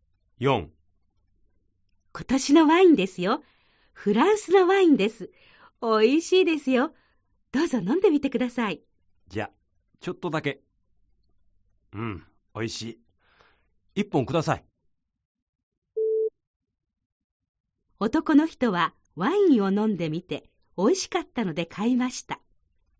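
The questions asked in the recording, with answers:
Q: 男の人はワインを飲んでみておいしかったので買いました。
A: ○(正しい)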